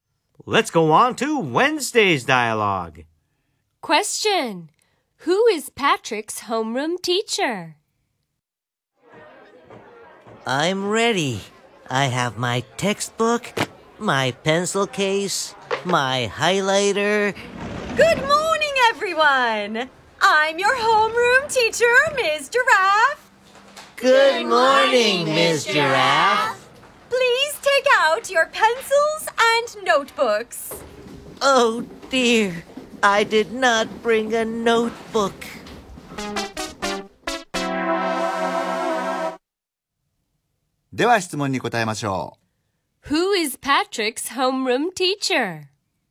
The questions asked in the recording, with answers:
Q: Who is Patrick's homeroom teacher?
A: Ms. Giraffe。